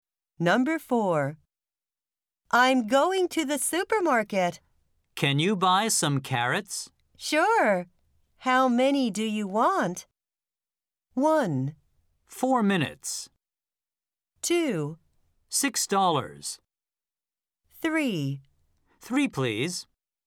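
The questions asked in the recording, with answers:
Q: Sure. How many do you want?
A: 3: 3, please.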